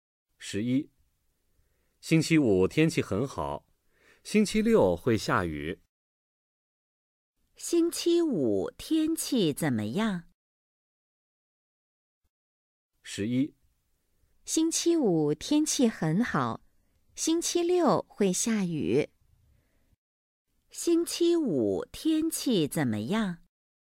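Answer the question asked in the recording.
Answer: 很好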